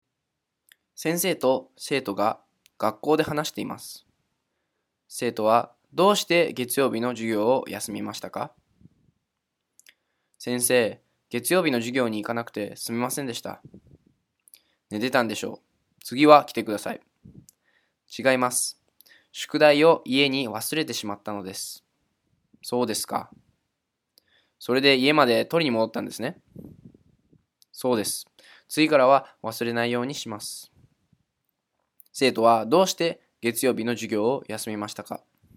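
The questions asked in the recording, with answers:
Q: 生徒はどうして月曜日の授業を休みましたか?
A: 宿題を家に忘れて、取りに戻ったから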